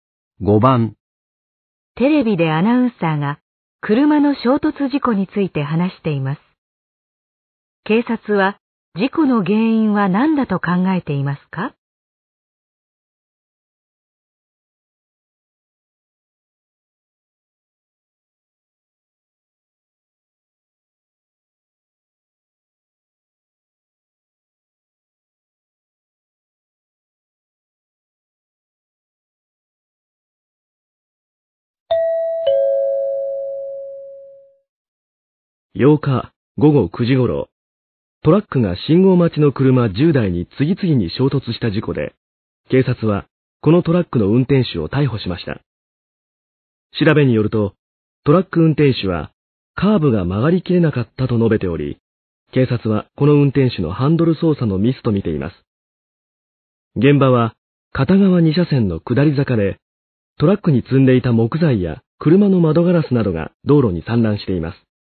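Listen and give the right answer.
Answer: 運転手のハンドル操作のミス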